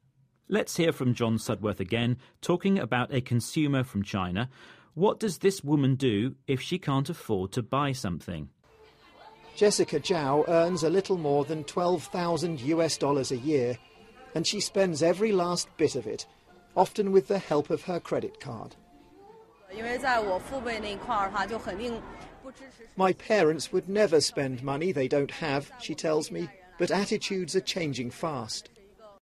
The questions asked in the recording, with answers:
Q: What does this woman do if she can't afford to buy something?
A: So that woman uses a credit card.